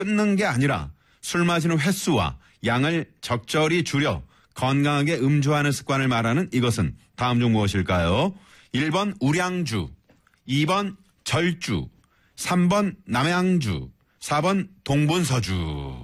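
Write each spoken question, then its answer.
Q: 끊는 게 아니라 술 마시는 횟수와 양을 적절히 줄여 건강하게 음주하는 습관을 말하는 이것은 다음 중 무엇일까요?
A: 2: 절주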